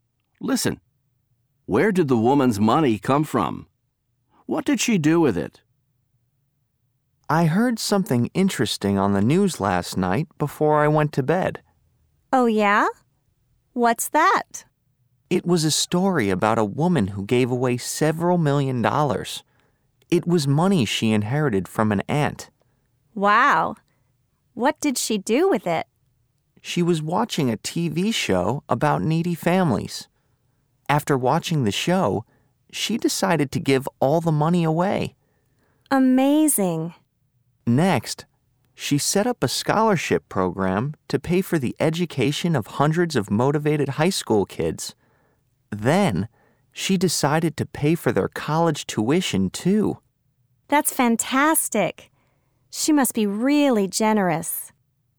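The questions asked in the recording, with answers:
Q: Where did the woman's money come from?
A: She inherited it from an aunt.

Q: What did she do with it?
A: She gave it away; she set up a scholarship program for motivated high school kids and paid their college tuition.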